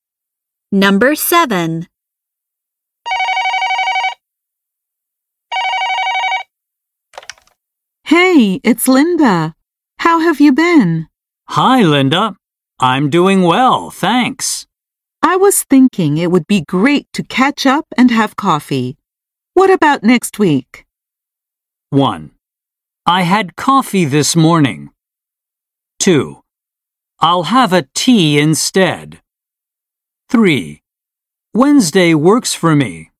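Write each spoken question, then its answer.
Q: What about next week?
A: 3: Wednesday works for me.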